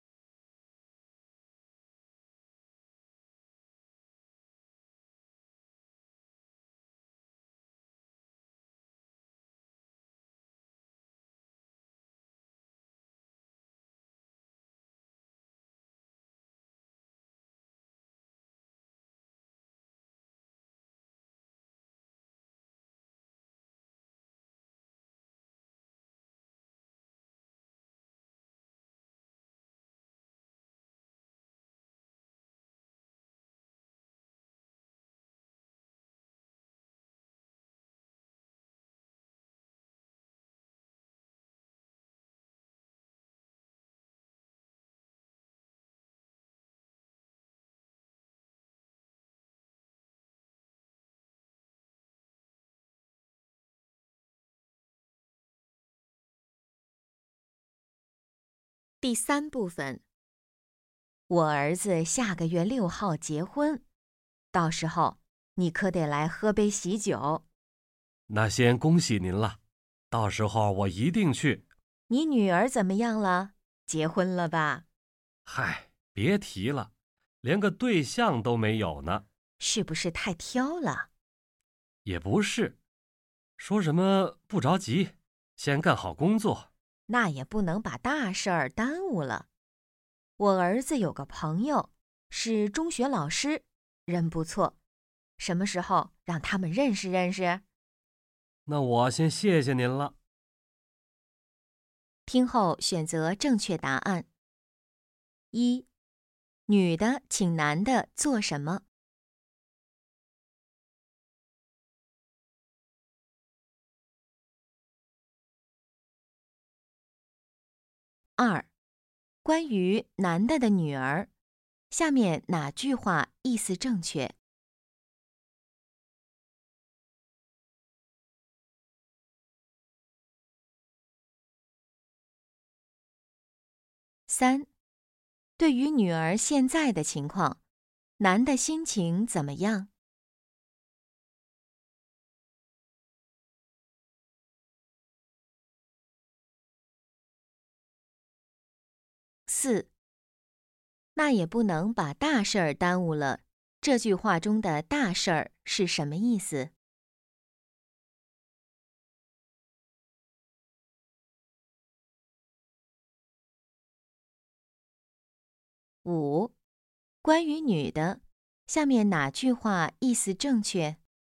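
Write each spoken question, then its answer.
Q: 女的请男的做什么?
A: 参加她儿子的婚礼,喝喜酒

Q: 关于男的的女儿,下面哪句话意思正确?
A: 她还没有对象,想先干好工作

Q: 那也不能把大事儿耽误了,这句话中的大事儿是什么意思?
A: 找对象结婚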